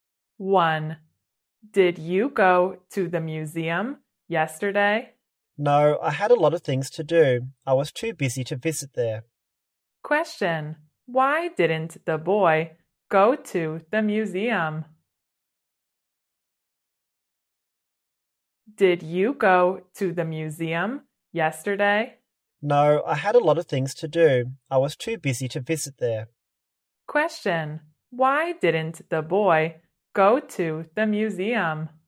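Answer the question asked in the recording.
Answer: He was too busy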